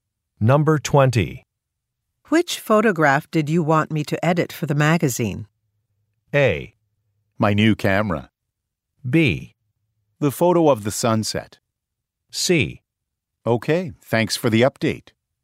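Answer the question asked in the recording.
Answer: B: The photo of the sunset.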